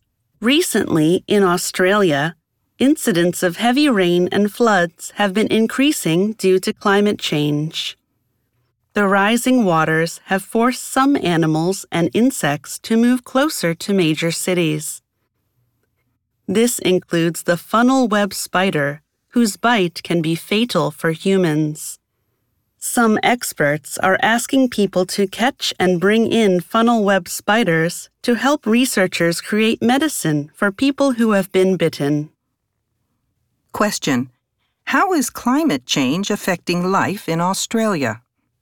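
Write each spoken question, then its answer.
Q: How is climate change affecting life in Australia?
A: More heavy rain and floods are pushing animals and insects, such as the deadly funnel web spider, closer to major cities.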